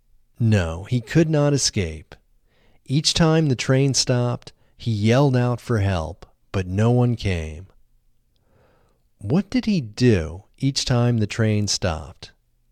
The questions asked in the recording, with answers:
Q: What did he do each time the train stopped?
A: He yelled out for help each time the train stopped.